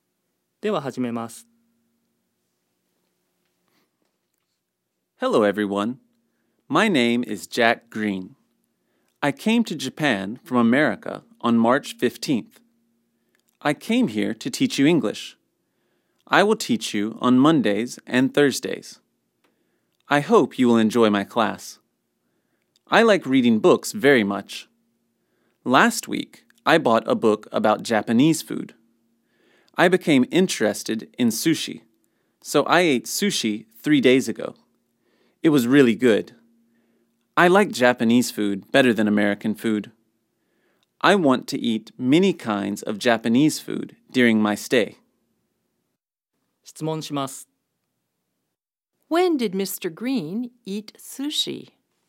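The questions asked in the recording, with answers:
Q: When did Mr. Green eat sushi?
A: He ate sushi three days ago.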